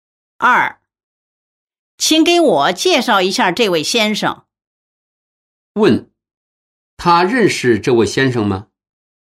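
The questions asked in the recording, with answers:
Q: 他认识这位先生吗?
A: 不认识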